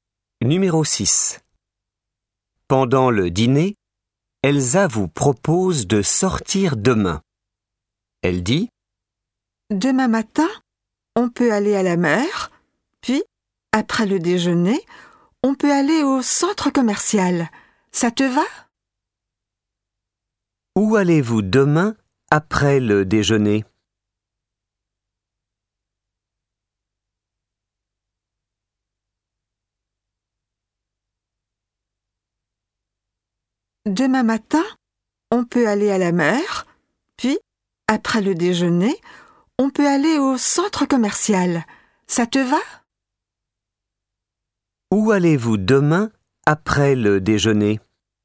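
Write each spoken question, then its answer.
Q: Où allez-vous demain après le déjeuner ?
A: Au centre commercial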